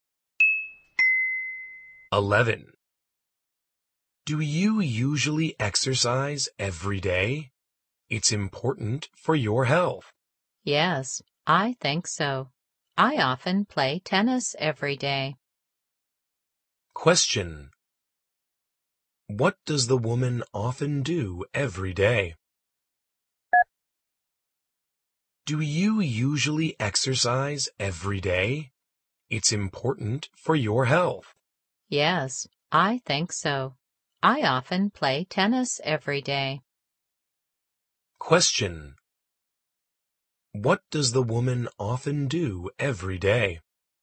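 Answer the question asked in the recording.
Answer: She plays tennis.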